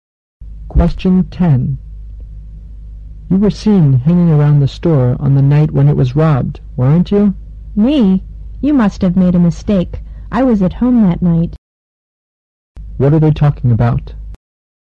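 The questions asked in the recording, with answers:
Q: What are they talking about?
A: A store robbery (the man denies being near the store).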